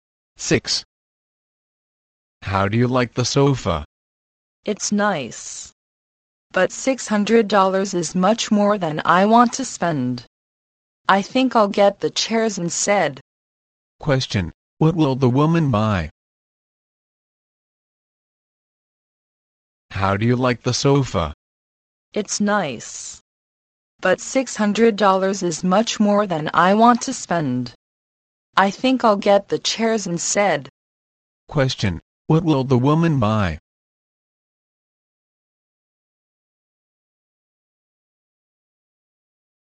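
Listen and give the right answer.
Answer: The chairs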